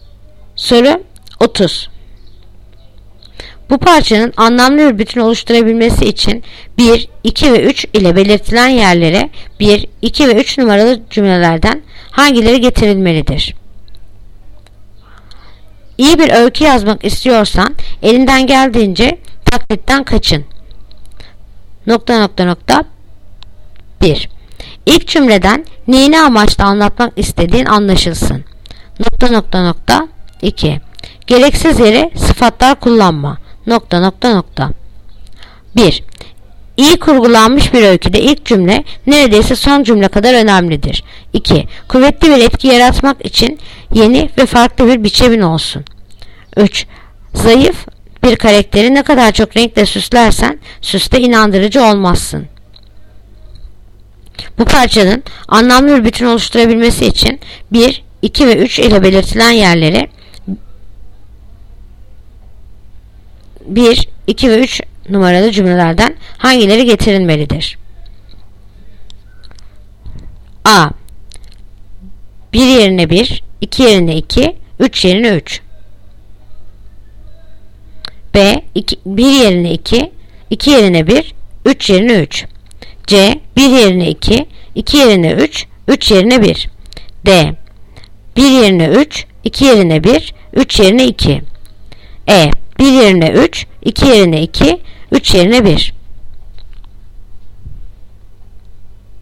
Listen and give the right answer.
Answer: Yanıt Bursa.